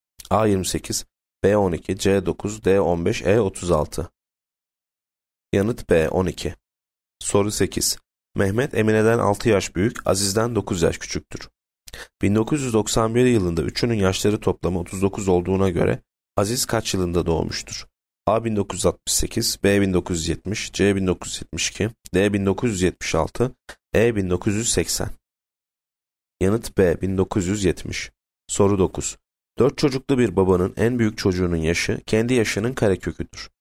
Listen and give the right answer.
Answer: Yanıt B 1970